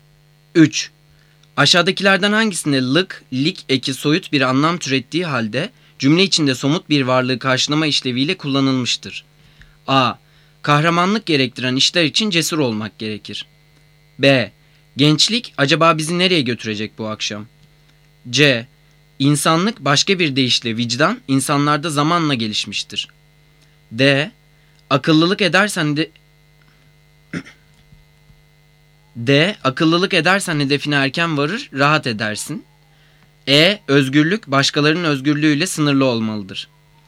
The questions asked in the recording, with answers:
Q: Aşağıdakilerden hangisinde lık, lik eki soyut bir anlam türettiği halde cümle içinde somut bir varlığı karşılama işleviyle kullanılmıştır?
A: Cevap B. Gençlik acaba bizi nereye götürecek bu akşam?